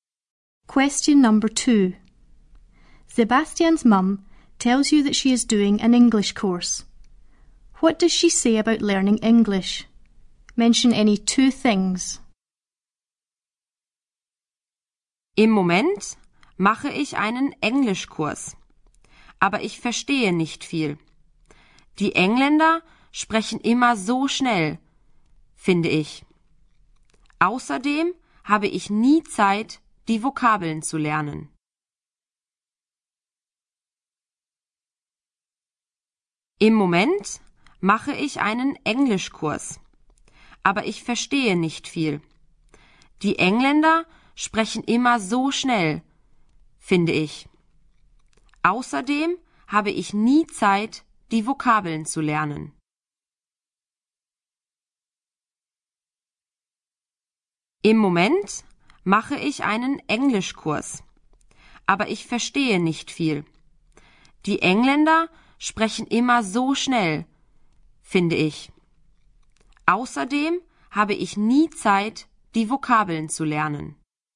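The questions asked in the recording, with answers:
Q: What does she say about learning English?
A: Any two: she doesn't understand much; the English always speak so fast; she never has time to learn the vocabulary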